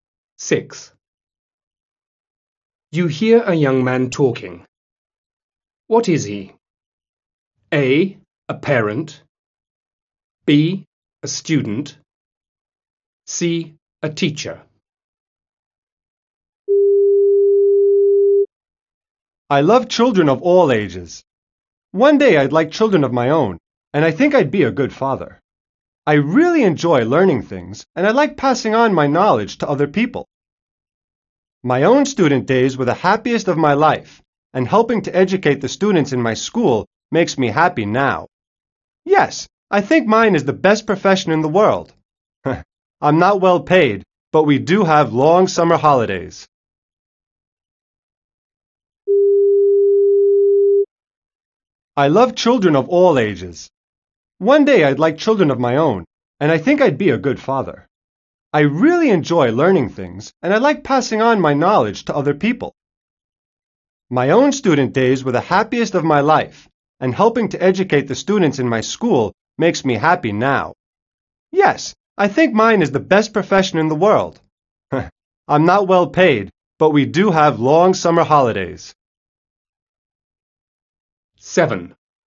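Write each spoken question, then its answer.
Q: What is he?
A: C: A teacher.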